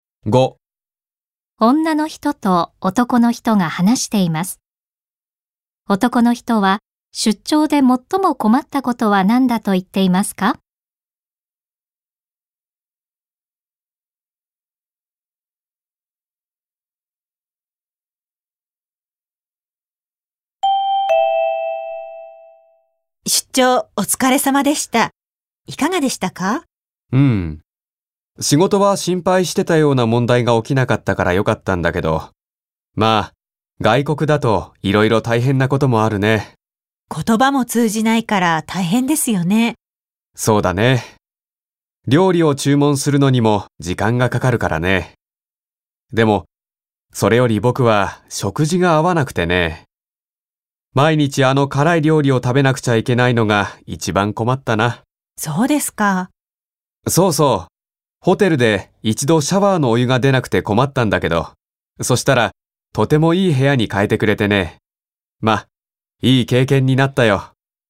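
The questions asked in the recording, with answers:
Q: 男の人は出張で最も困ったことは何だと言っていますか?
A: 食事が合わなかったこと(毎日辛い料理を食べなければならなかったこと)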